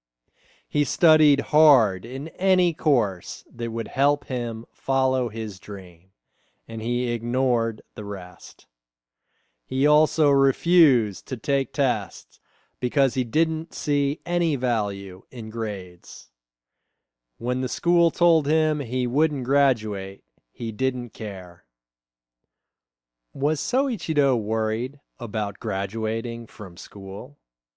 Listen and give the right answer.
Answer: No, he wasn't worried about graduating.